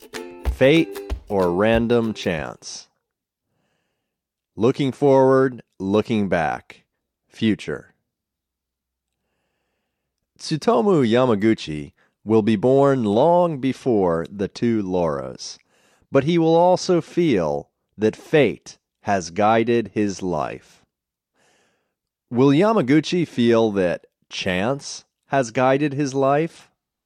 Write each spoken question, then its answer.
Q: Will Yamaguchi feel that chance has guided his life?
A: No, he won't feel that chance has guided his life.